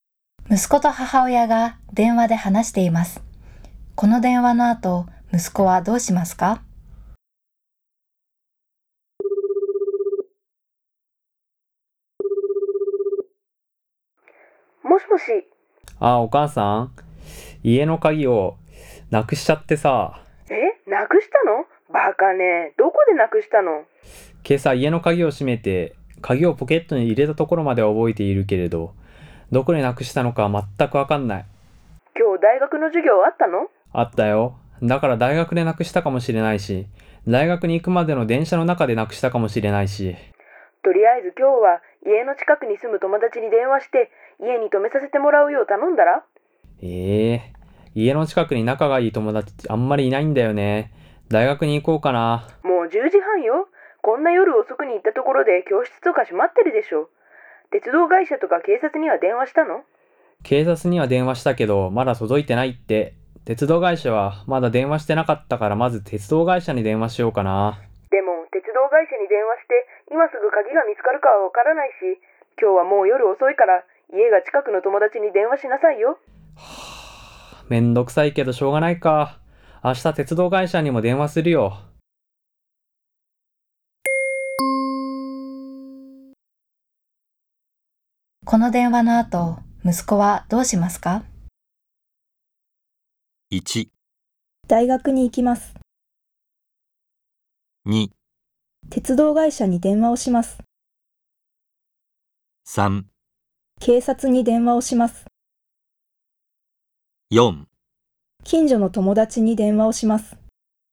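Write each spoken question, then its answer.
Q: この電話の後、息子はどうしますか?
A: 4: 近所の友達に電話をします。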